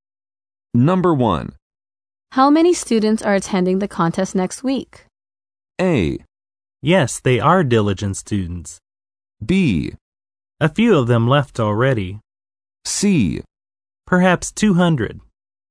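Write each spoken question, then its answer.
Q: How many students are attending the contest next week?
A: C: Perhaps 200.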